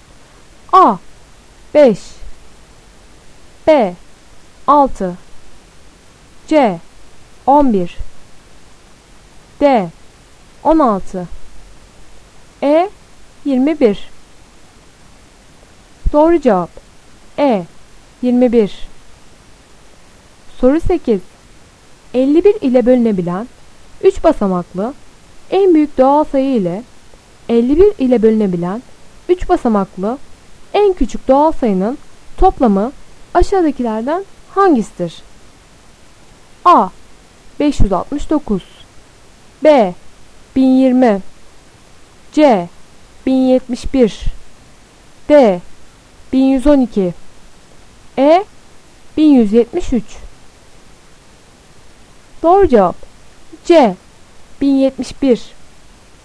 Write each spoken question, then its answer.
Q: 51 ile bölünebilen 3 basamaklı en büyük doğal sayı ile 51 ile bölünebilen 3 basamaklı en küçük doğal sayının toplamı aşağıdakilerden hangisidir?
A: Doğru cevap C 1071